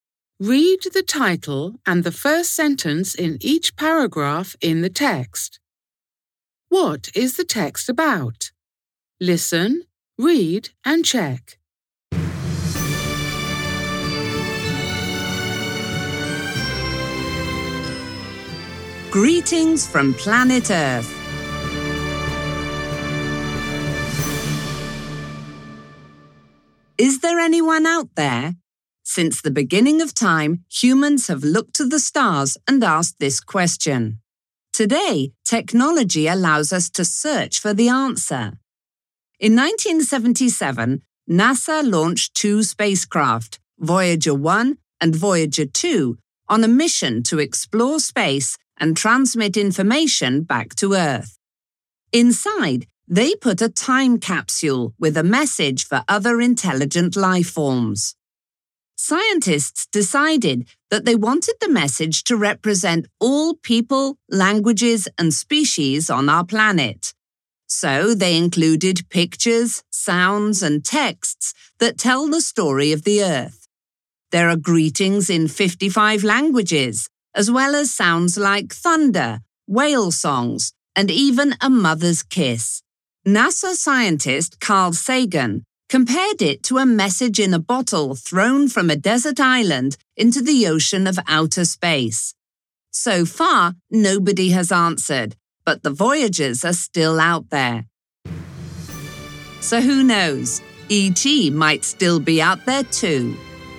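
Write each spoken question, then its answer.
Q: What is the text about?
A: The Voyager spacecraft carrying a time capsule with a message from Earth to other intelligent life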